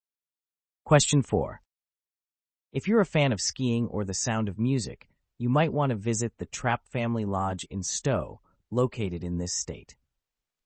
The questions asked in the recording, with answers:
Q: If you're a fan of skiing or the Sound of Music, you might want to visit the Trapp Family Lodge in Stowe, located in this state.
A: The answer is Vermont.